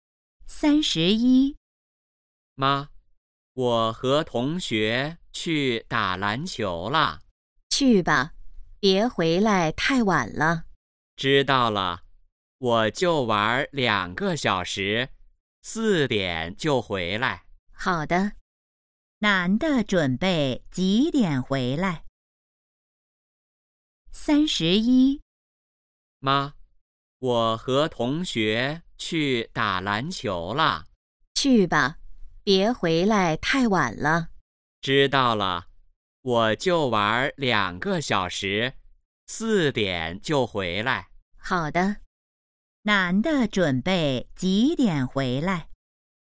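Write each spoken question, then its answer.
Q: 男的准备几点回来?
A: 四点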